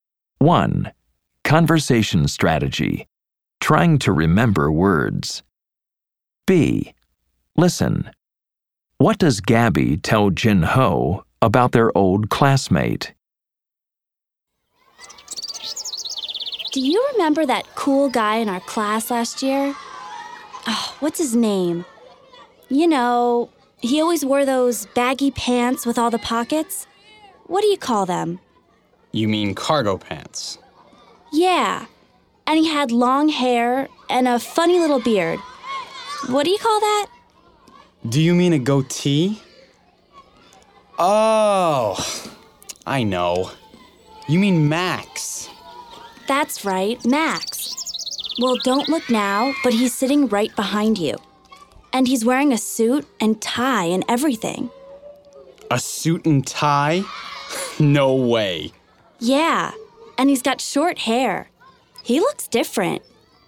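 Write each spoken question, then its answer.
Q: What does Gabby tell Jin Ho about their old classmate?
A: Max is sitting right behind him, wearing a suit and tie, and he has short hair now and looks different.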